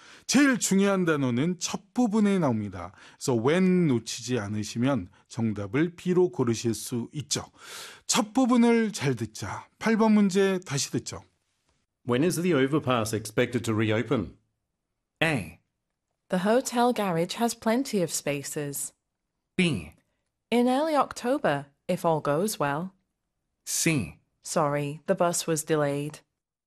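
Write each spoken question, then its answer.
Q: When is the overpass expected to reopen?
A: B: In early October, if all goes well.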